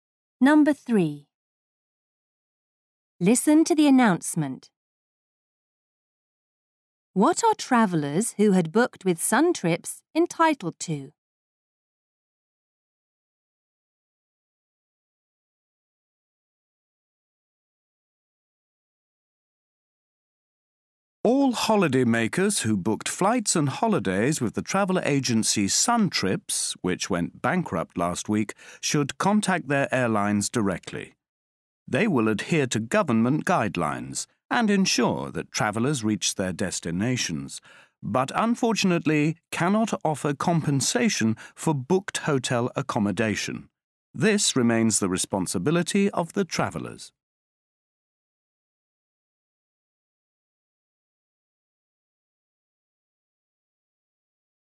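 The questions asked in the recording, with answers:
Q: What are travellers who had booked with Sun Trips entitled to?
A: Being flown to their destinations by the airlines, but no compensation for hotel accommodation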